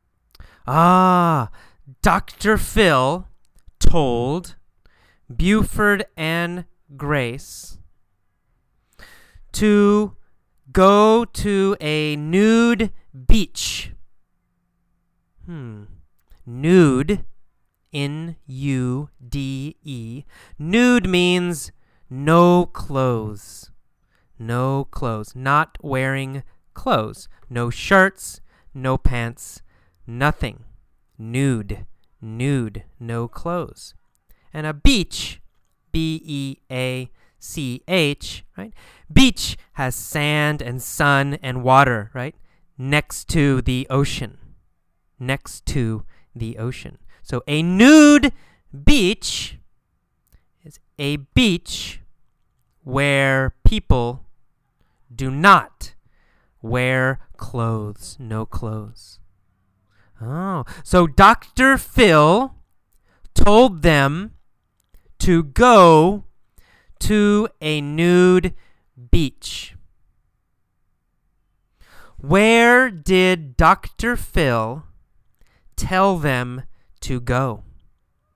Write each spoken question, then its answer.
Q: Where did Dr. Phil tell them to go?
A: He told them to go to a nude beach.